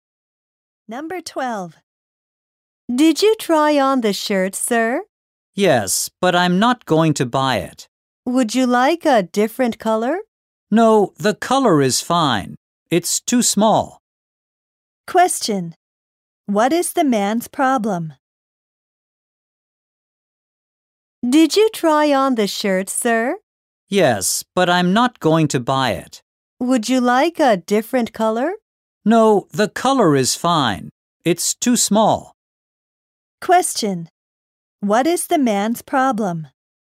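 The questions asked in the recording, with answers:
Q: What is the man's problem?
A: The shirt is too small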